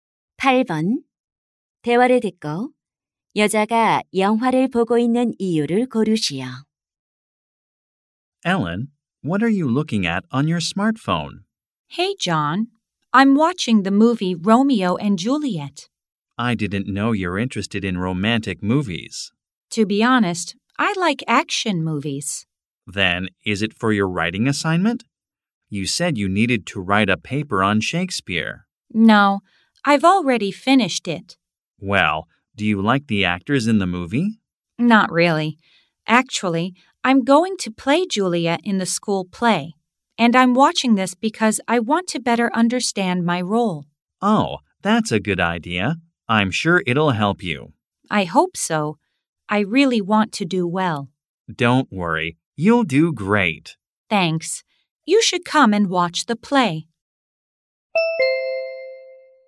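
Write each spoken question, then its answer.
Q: 대화를 듣고 여자가 영화를 보고 있는 이유를 고르시오.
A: 학교 연극에서 맡은 줄리엣 역할을 더 잘 이해하려고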